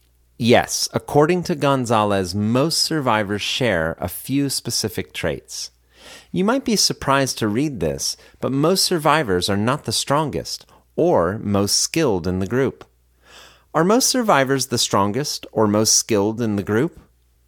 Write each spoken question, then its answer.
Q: Are most survivors the strongest or most skilled in the group?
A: No, most survivors are not the strongest or most skilled in the group.